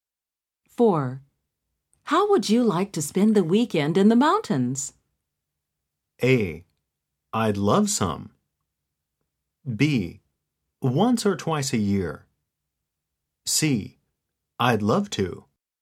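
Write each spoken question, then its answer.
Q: How would you like to spend the weekend in the mountains?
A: C: I'd love to.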